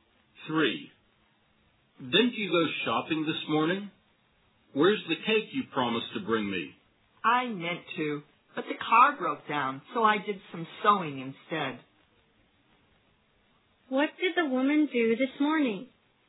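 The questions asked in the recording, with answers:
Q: What did the woman do this morning?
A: She did some sewing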